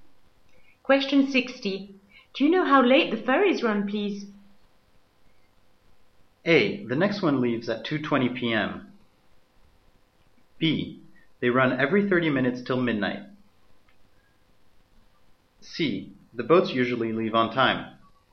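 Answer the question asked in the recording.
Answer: B: They run every 30 minutes till midnight.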